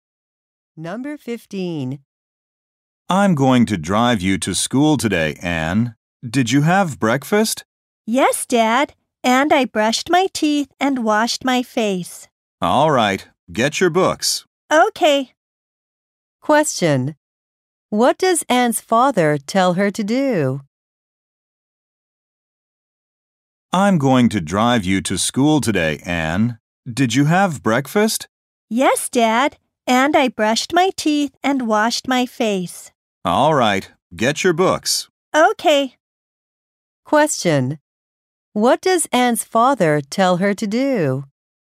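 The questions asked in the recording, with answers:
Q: What does Anne's father tell her to do?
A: Get her books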